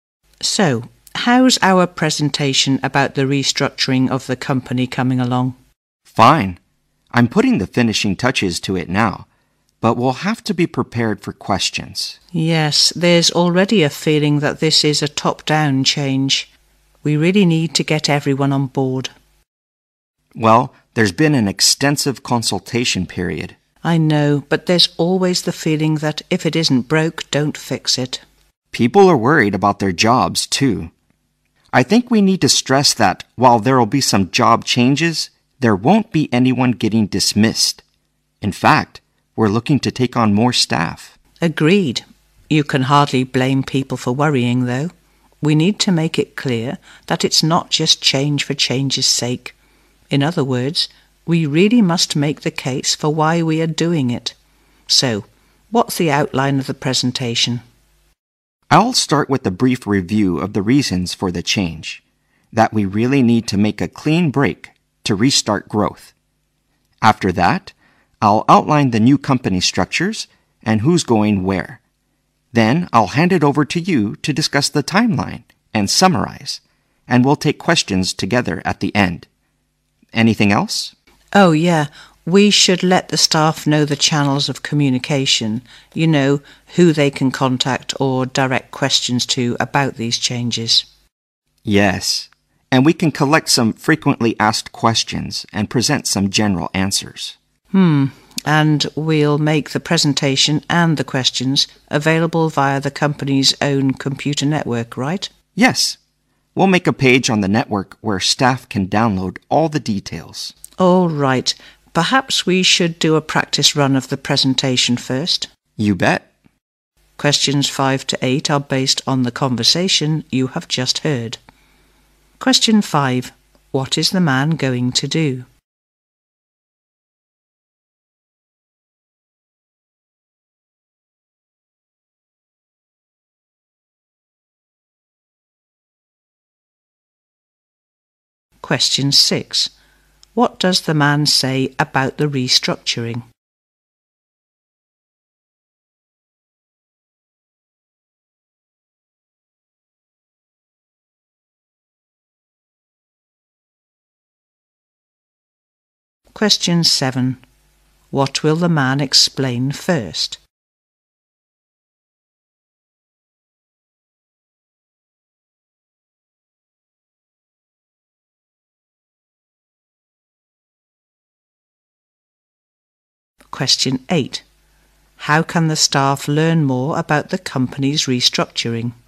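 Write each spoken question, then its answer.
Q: How can the staff learn more about the company's restructuring?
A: By downloading the details from a page on the company's computer network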